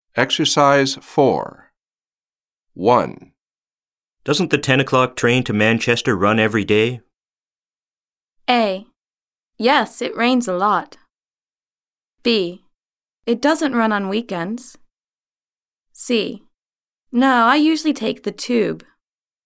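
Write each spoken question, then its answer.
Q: Doesn't the 10 o'clock train to Manchester run every day?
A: B: It doesn't run on weekends.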